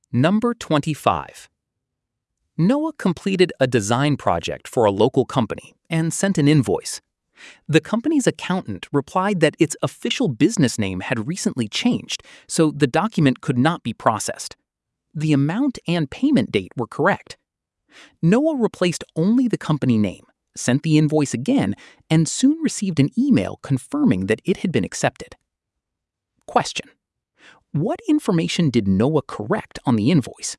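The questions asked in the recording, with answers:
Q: what information did Noah correct on the invoice?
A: The company's name (its new official business name)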